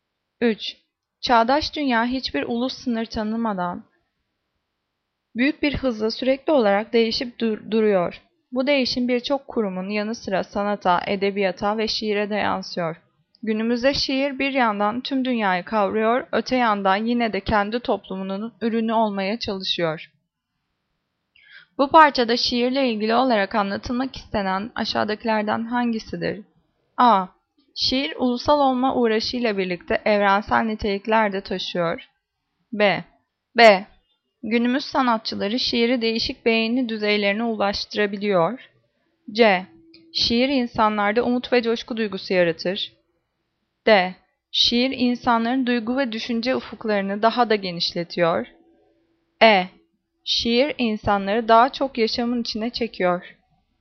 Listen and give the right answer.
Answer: Cevap A. Şiir ulusal olma uğraşıyla birlikte evrensel niteliklerde taşıyor.